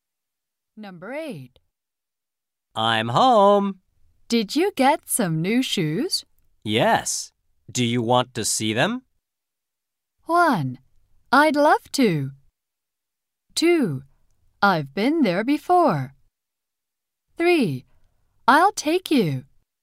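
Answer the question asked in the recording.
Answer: 1: I'd love to.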